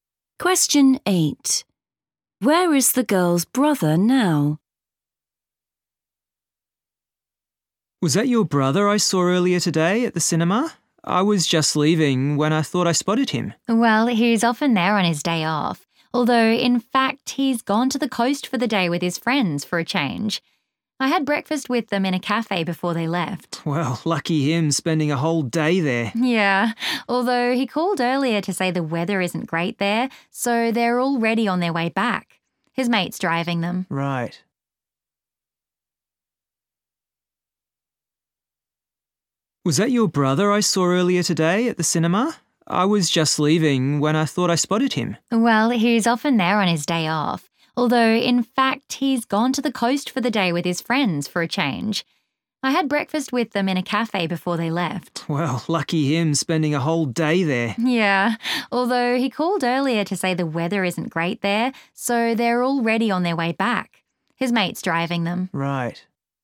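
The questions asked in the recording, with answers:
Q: Where is the girl's brother now?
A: in his friend's car, on the way back from the coast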